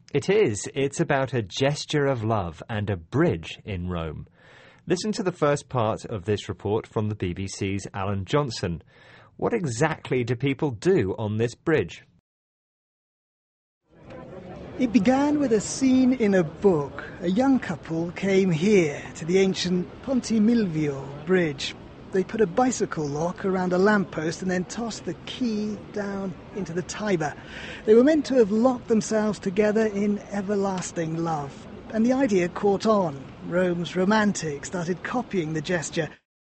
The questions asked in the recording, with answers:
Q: What exactly do people do on this bridge?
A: They leave a small lock attached to the bridge.